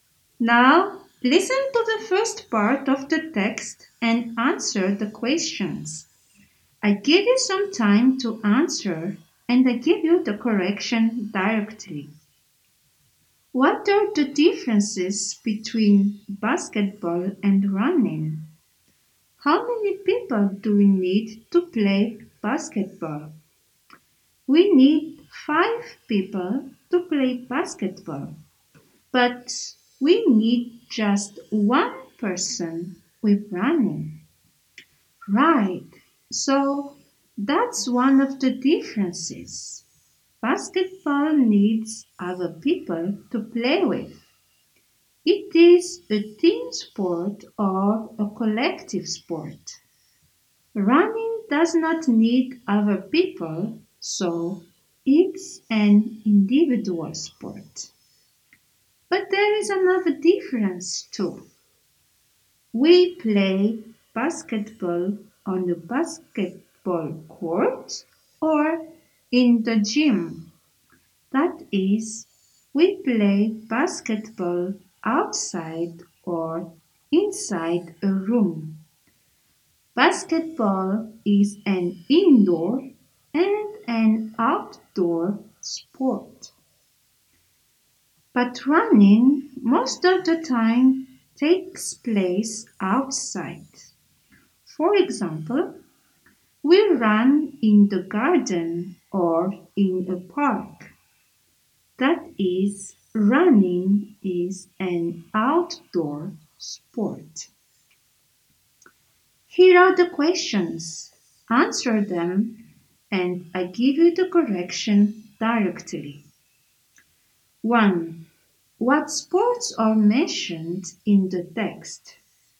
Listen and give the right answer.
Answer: Basketball and running.